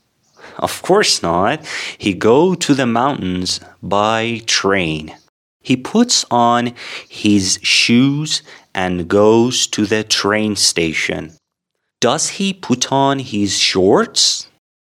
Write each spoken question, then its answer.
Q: Does he put on his shorts?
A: Of course not. He puts on his shoes and goes to the train station.